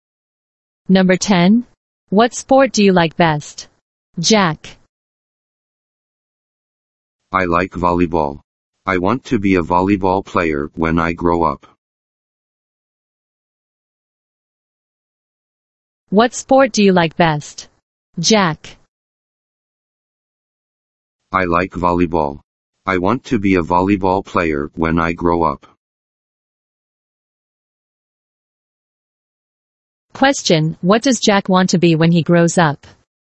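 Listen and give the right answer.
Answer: A volleyball player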